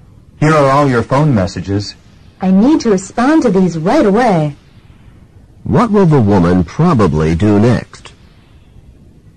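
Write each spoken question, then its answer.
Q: What will the woman probably do next?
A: Respond to her phone messages.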